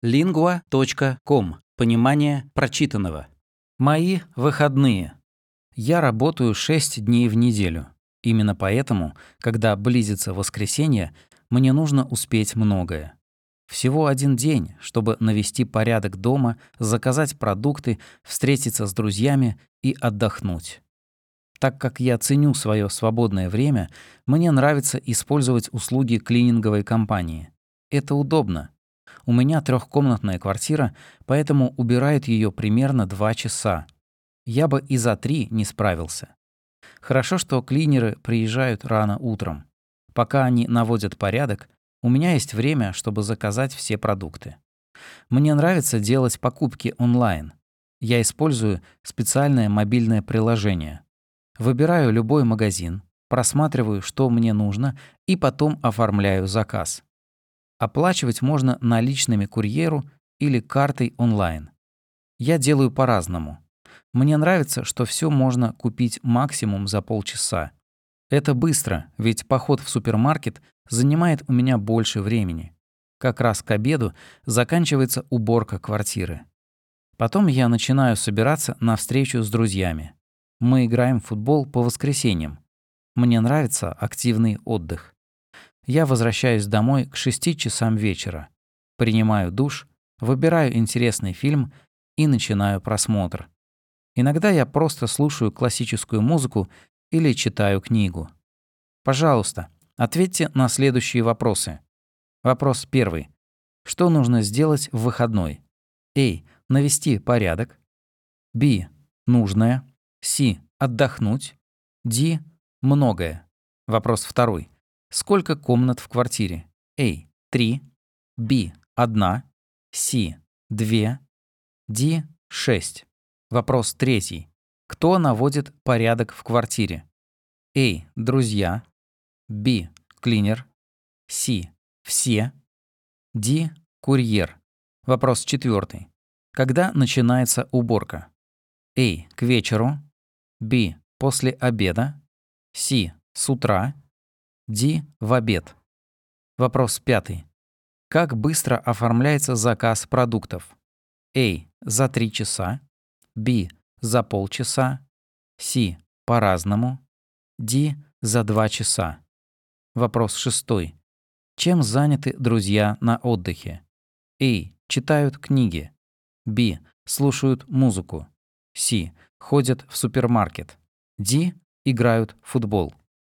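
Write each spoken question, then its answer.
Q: Сколько комнат в квартире?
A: A: 3

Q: Кто наводит порядок в квартире?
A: B: Клинер

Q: Когда начинается уборка?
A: C: С утра

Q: Как быстро оформляется заказ продуктов?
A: B: За 30 минут

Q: Чем заняты друзья на отдыхе?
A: D: Играют в футбол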